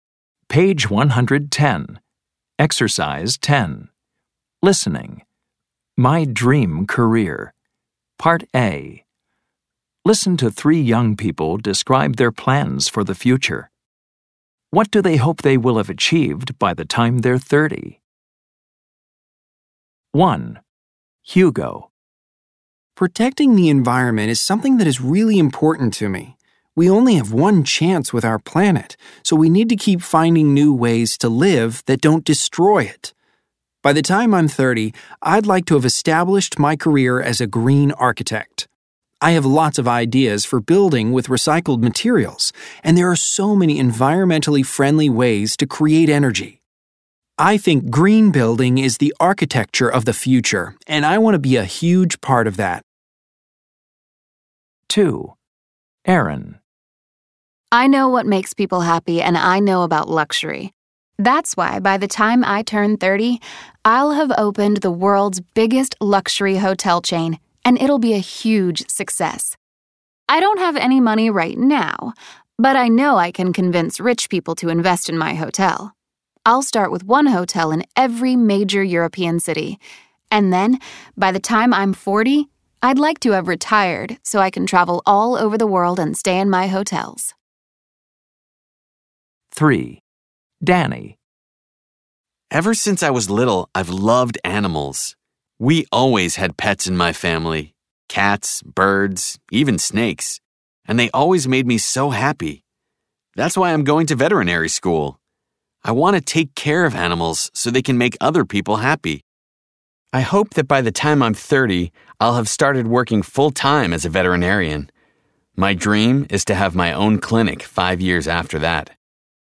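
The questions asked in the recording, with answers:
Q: What do they hope they will have achieved by the time they're 30?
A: Hugo: established his career as a green architect

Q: What do they hope they will have achieved by the time they're 30?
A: Aaron: opened the world's biggest luxury hotel chain

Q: What do they hope they will have achieved by the time they're 30?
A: Danny: started working full-time as a veterinarian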